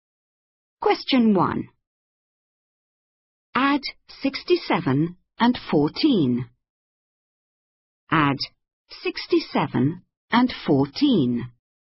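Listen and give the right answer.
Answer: 81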